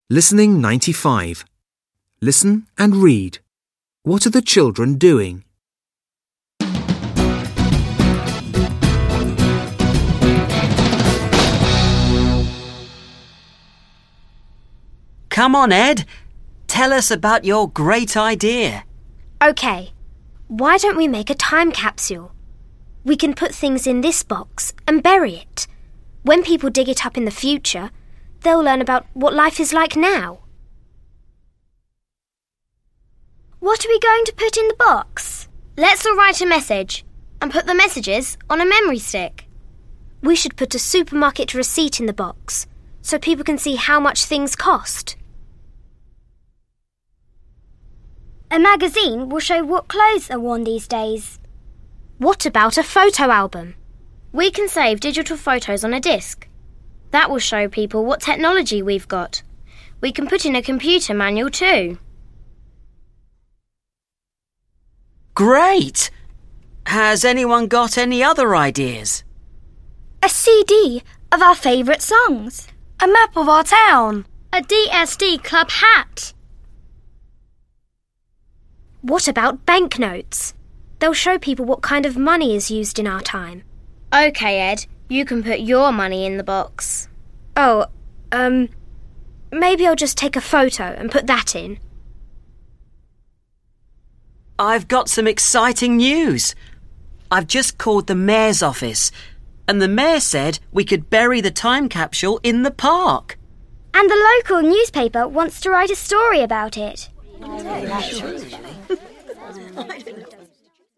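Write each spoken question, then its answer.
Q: What are the children doing?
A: They are planning a time capsule to bury.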